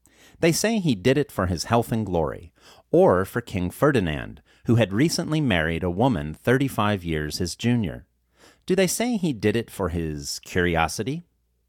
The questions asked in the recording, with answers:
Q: Do they say he did it for his curiosity?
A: No, they do not say he did it for his curiosity.